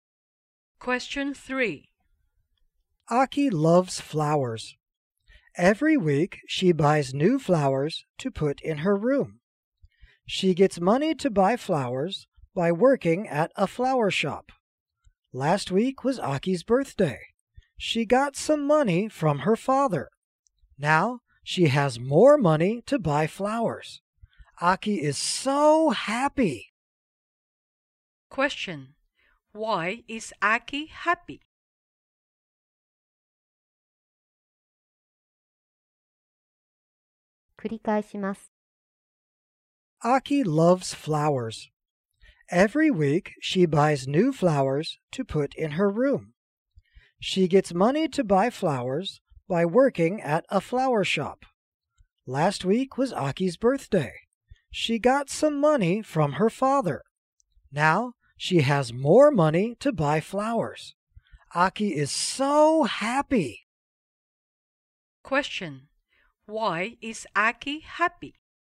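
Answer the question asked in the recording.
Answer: She got money from her father, so she has more money to buy flowers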